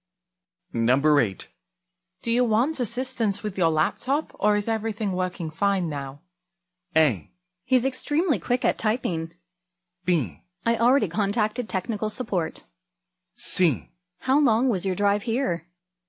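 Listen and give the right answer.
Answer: B: I already contacted technical support.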